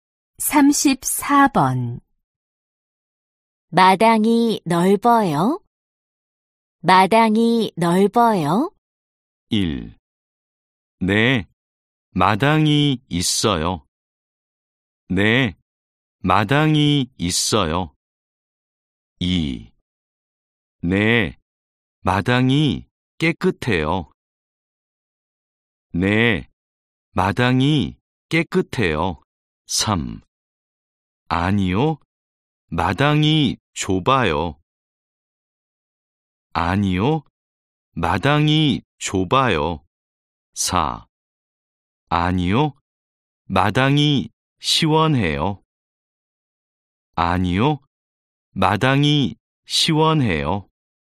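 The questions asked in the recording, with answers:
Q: 마당이 넓어요?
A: 3: 아니요, 마당이 좁아요.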